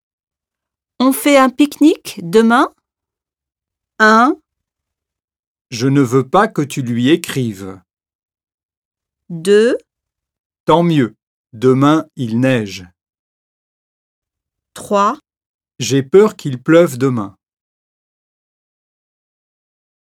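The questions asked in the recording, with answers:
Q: On fait un pique-nique demain?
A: 3: J'ai peur qu'il pleuve demain.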